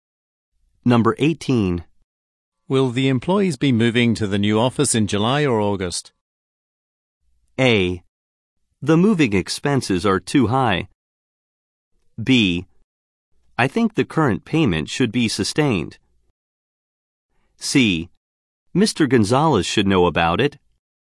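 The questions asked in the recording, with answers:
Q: Will the employees be moving to the new office in July or August?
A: C: Mr. Gonzalez should know about it.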